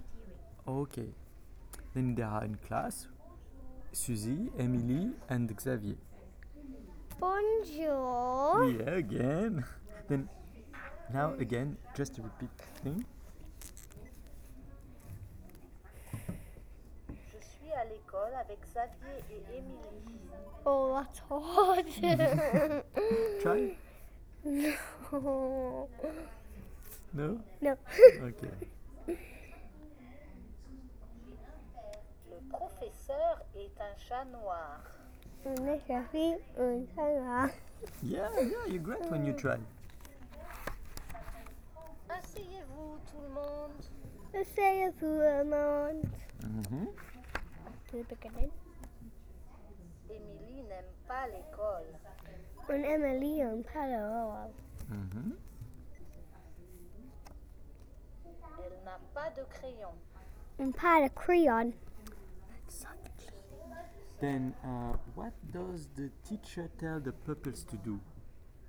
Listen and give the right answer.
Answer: No, he said, asseyez-vous, do you remember?